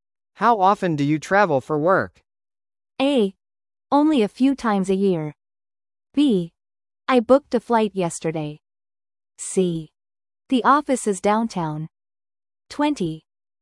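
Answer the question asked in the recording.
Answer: A: Only a few times a year.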